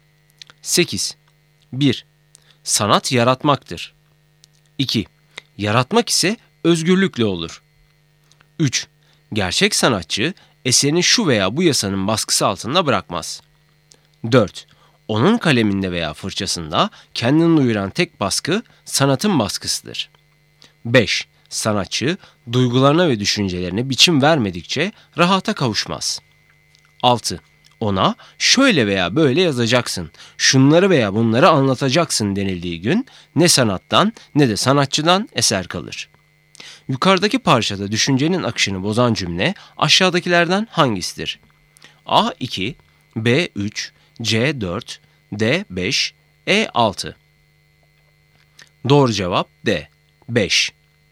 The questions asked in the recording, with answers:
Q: Yukarıdaki parçada düşüncenin akışını bozan cümle aşağıdakilerden hangisidir?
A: Doğru cevap D 5.